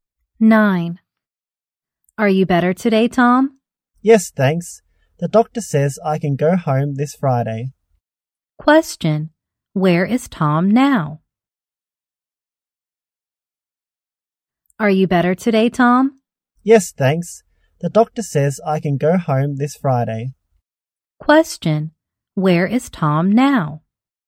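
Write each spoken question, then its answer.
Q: where is Tom now?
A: In hospital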